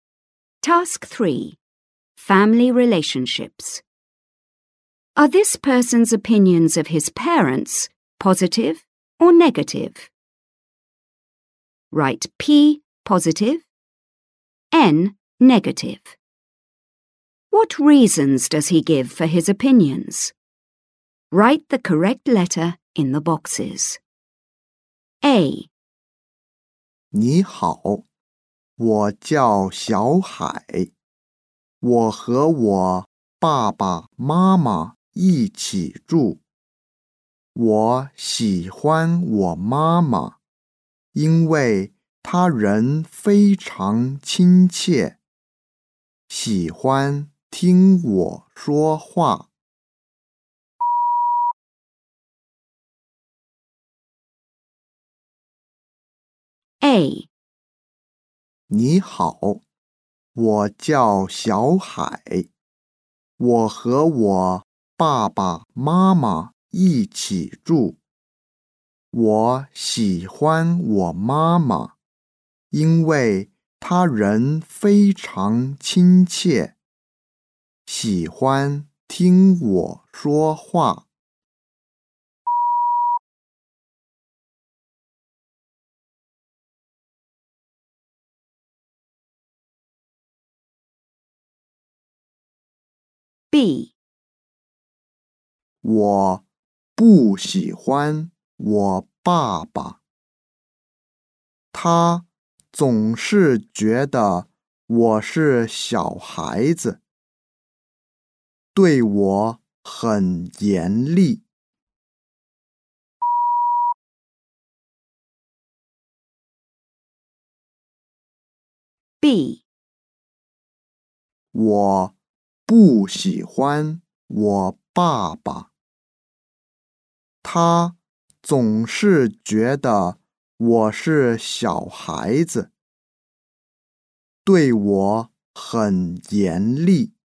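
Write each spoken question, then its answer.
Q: Are this person's opinions of his parents positive or negative?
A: P: positive (his mother)

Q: What reasons does he give for his opinions?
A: She is very kind and likes listening to him

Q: Are this person's opinions of his parents positive or negative?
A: N: negative (his father)

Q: What reasons does he give for his opinions?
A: He always treats him like a child and is very strict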